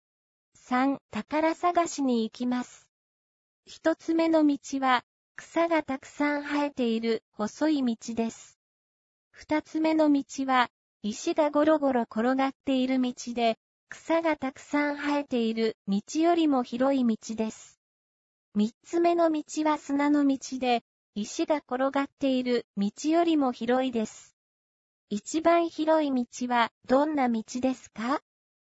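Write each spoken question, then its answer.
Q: 一番広い道はどんな道ですか?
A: 砂の道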